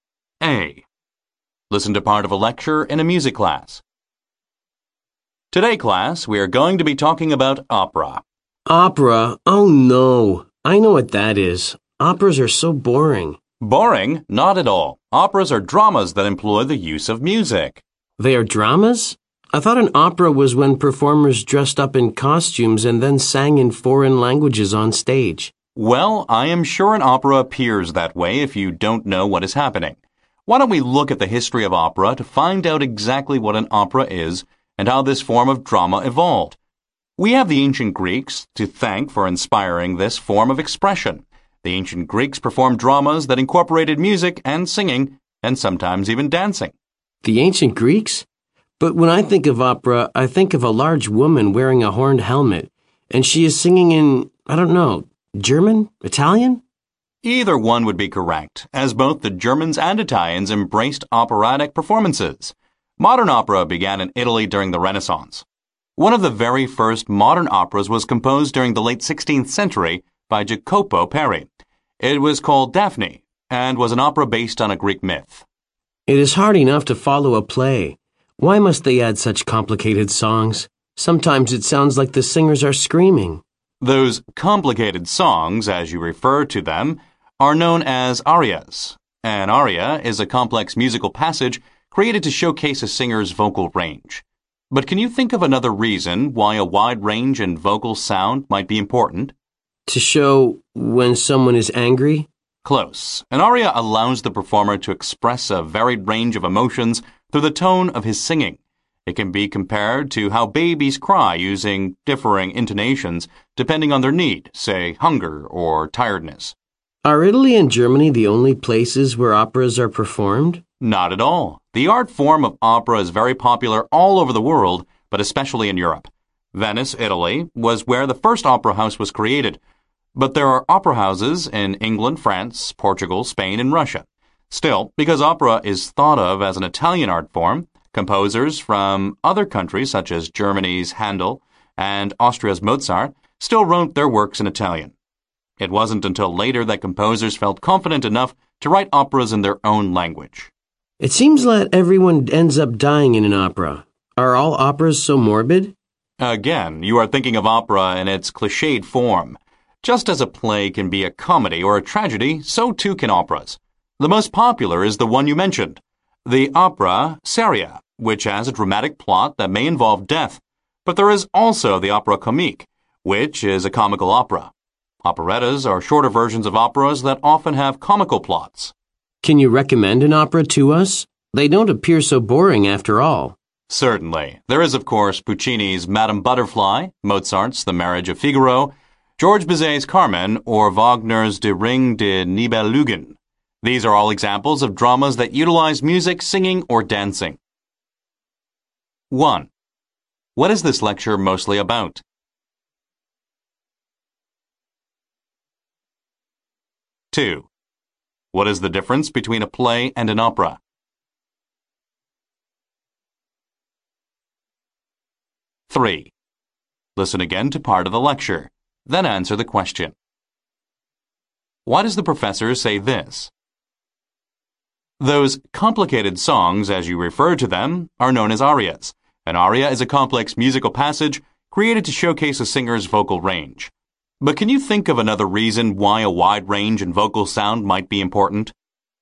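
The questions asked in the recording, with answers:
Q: What is this lecture mostly about?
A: The history and nature of opera

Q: What is the difference between a play and an opera?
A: An opera is a drama that uses music (singing)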